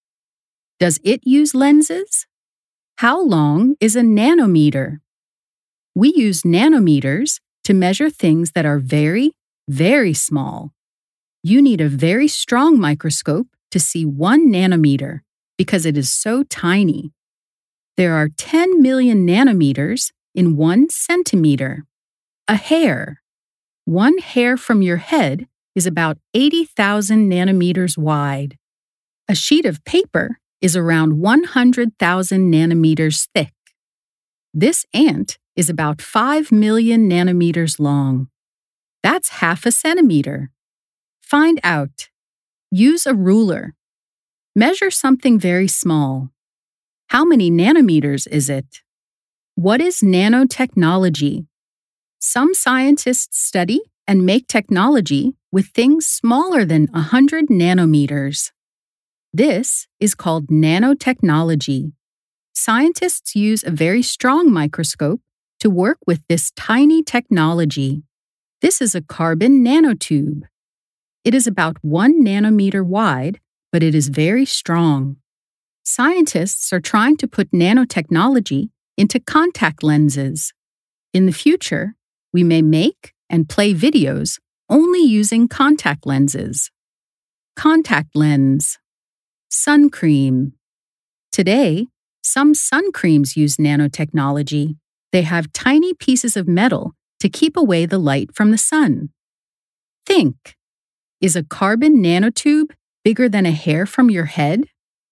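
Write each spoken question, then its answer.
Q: Is a carbon nanotube bigger than a hair from your head?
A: No, it is much smaller (about 1 nanometer wide vs. about 80,000 nanometers)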